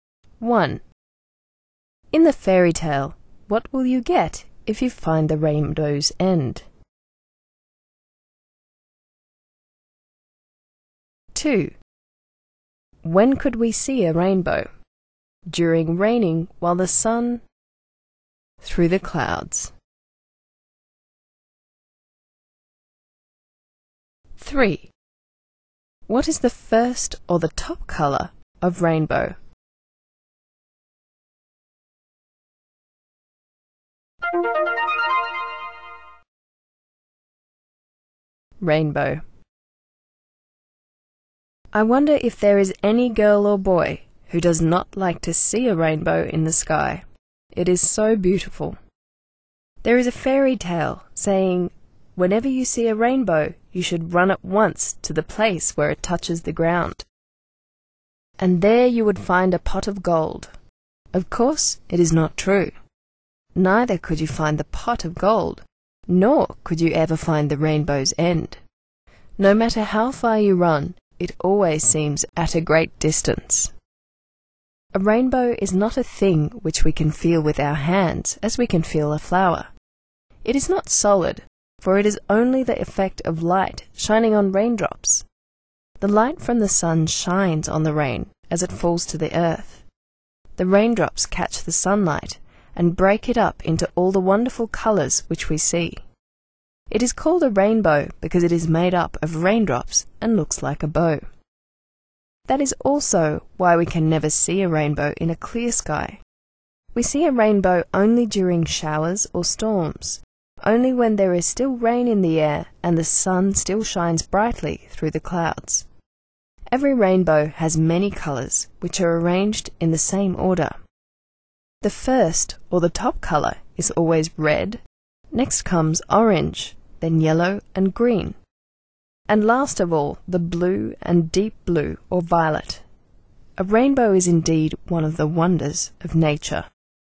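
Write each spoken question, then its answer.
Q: In the fairy tale, what will you get if you find the rainbow's end?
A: A pot of gold

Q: When could we see a rainbow?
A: During showers or storms, when there is still rain in the air and the sun still shines through the clouds

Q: What is the first or the top colour of rainbow?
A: Red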